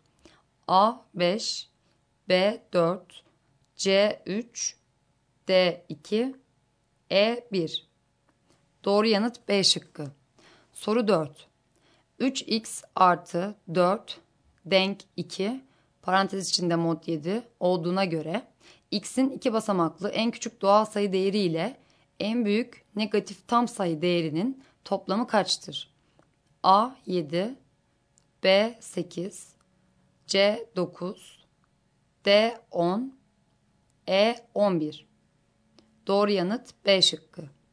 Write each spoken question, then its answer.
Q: 3x artı 4 denk 2 parantez içinde mod 7 olduğuna göre x'in 2 basamaklı en küçük doğal sayı değeri ile en büyük negatif tam sayı değerinin toplamı kaçtır?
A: Doğru yanıt B şıkkı.